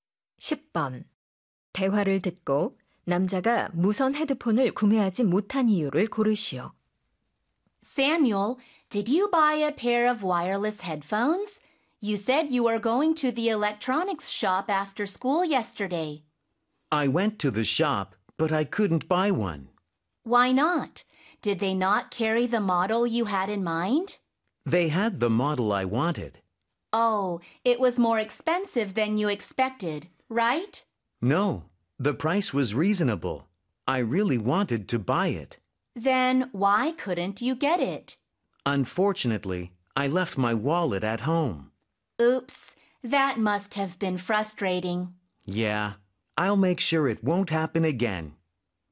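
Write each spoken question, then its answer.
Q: 대화를 듣고 남자가 무선 헤드폰을 구매하지 못한 이유를 고르시오.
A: 지갑을 집에 두고 와서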